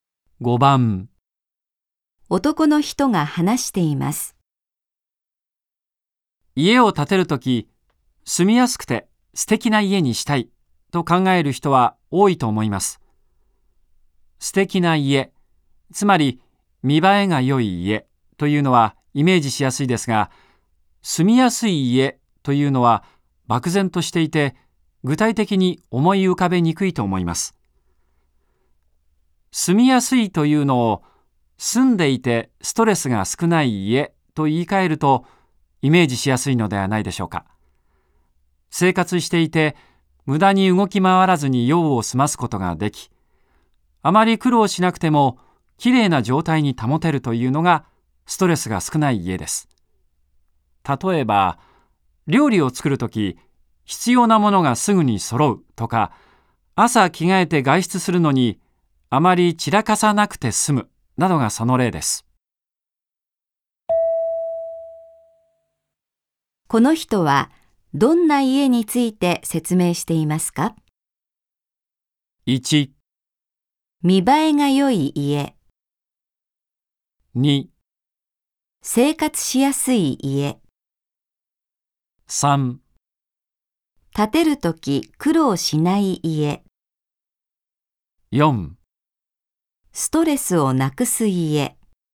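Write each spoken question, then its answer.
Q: この人はどんな家について説明していますか ?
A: 2: 生活しやすい家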